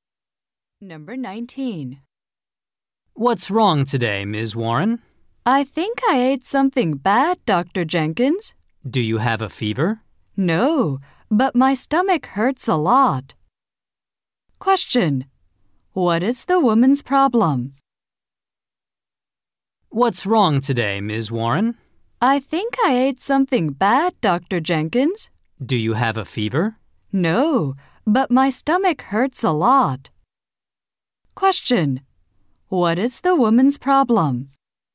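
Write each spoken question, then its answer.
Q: What is the woman's problem?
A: Her stomach hurts.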